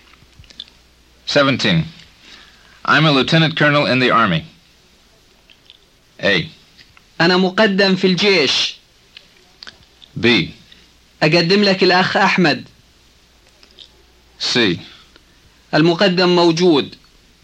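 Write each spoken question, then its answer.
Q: I'm a Lieutenant Colonel in the Army.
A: A: انا مقدم في الجيش.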